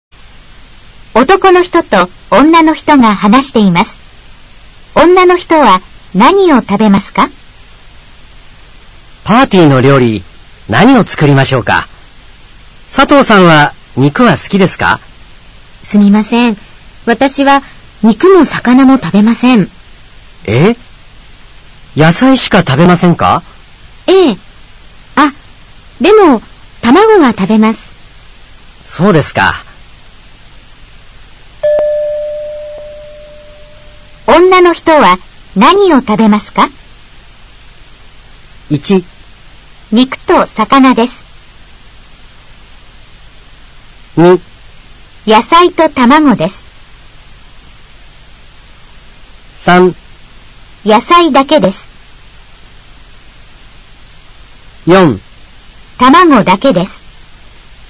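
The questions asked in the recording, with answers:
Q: 女の人は何を食べますか?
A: 2: 野菜と卵です。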